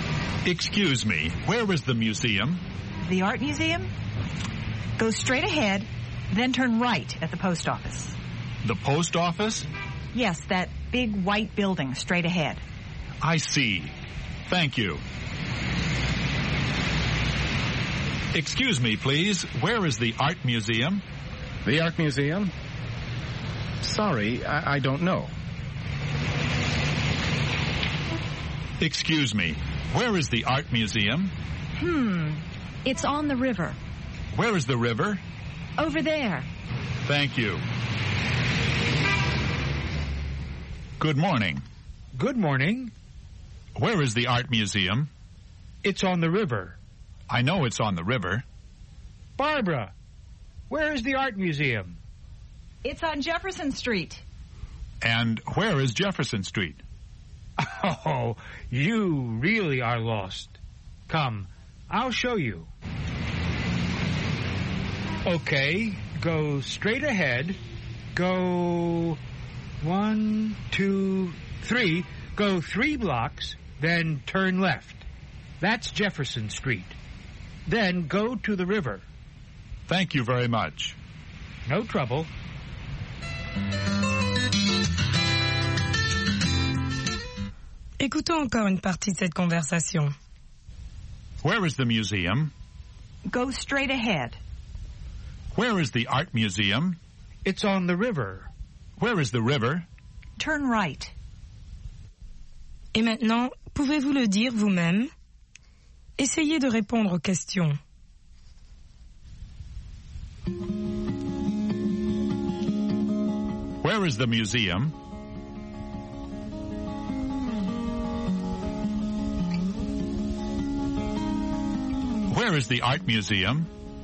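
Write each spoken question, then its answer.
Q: Where is the museum?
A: Go straight ahead, then turn right at the post office.

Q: Where is the art museum?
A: It's on the river.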